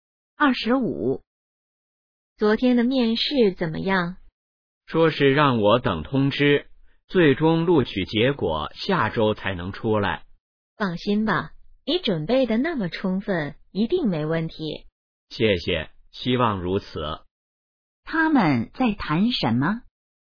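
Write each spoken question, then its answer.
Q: 他们在谈什么?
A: 面试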